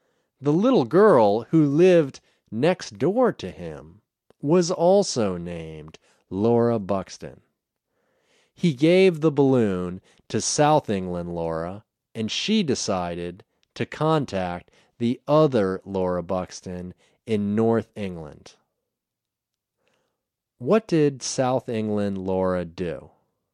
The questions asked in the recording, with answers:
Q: What did South England Laura do?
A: She decided to contact North England Laura.